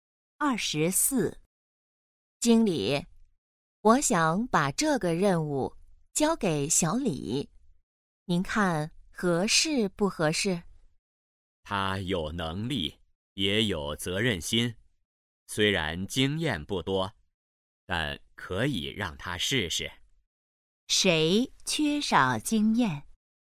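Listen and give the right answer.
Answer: 小李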